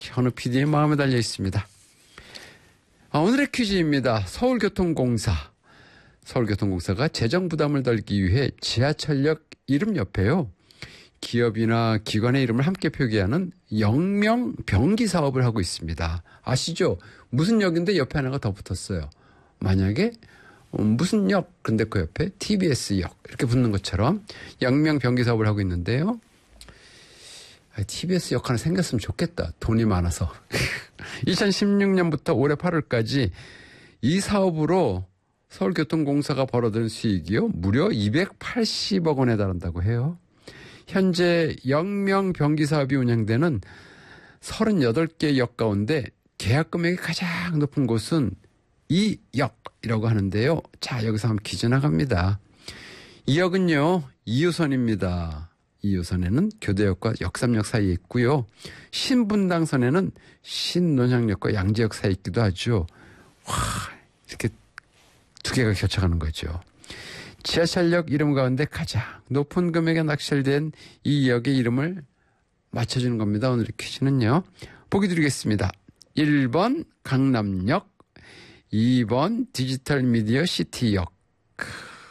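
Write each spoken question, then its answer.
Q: 지하철역 이름 가운데 가장 높은 금액에 낙찰된 이 역의 이름을 맞춰주는 겁니다.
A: 1: 강남역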